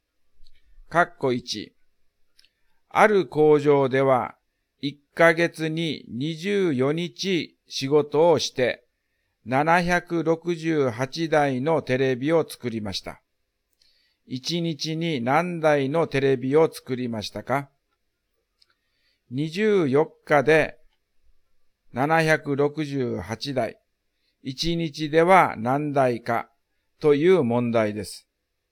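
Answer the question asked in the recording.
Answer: 32台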